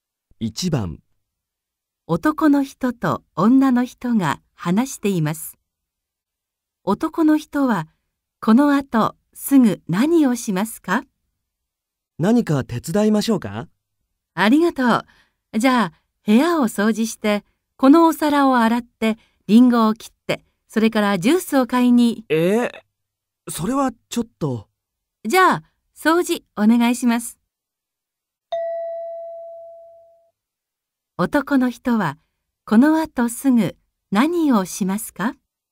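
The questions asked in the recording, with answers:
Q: 男の人はこのあとすぐ何をしますか?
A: 部屋を掃除する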